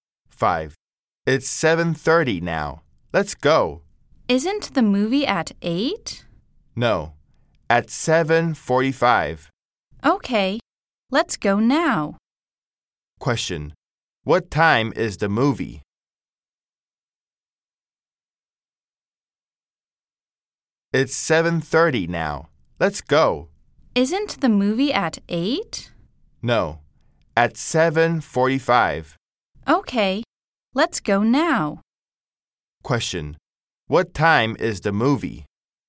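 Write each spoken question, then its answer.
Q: Question, what time is the movie?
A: 7:45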